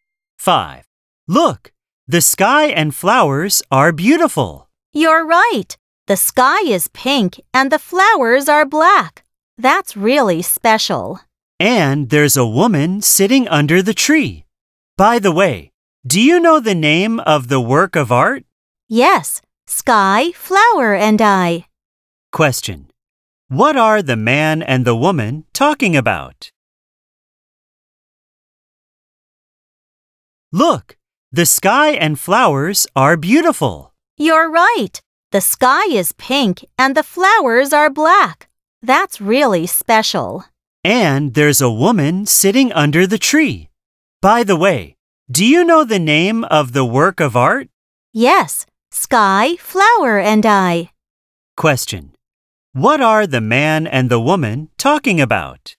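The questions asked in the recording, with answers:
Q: What are the man and the woman talking about?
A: A work of art (a painting)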